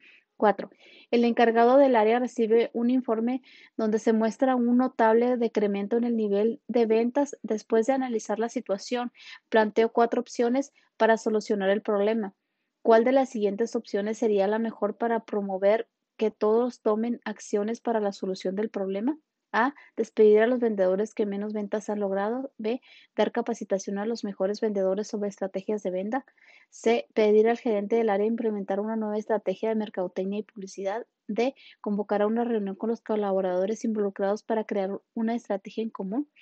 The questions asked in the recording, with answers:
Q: ¿Cuál de las siguientes opciones sería la mejor para promover que todos tomen acciones para la solución del problema?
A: Y la respuesta correcta es la D.